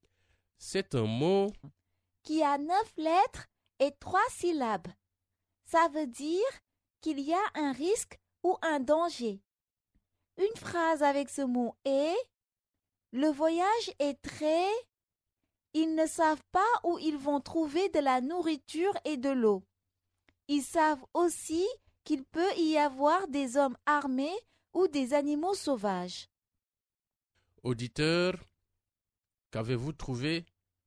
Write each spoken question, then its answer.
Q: Auditeur, qu'avez-vous trouvé?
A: Le mot mystère est dangereux.